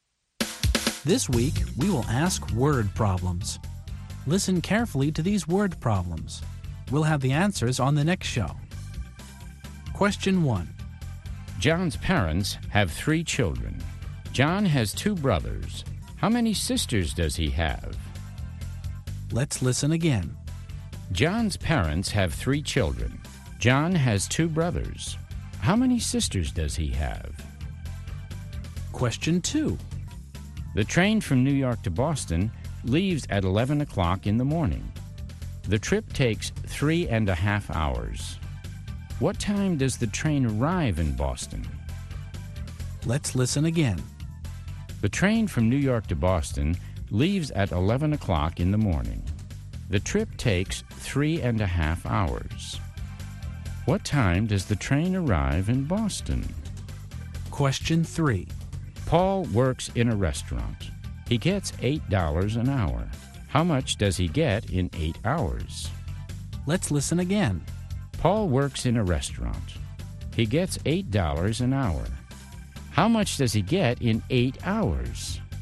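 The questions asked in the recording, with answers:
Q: John's parents have 3 children. John has 2 brothers. How many sisters does he have?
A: None (0 sisters)

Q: What time does the train arrive in Boston?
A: 2:30 in the afternoon

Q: How much does he get in 8 hours?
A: $64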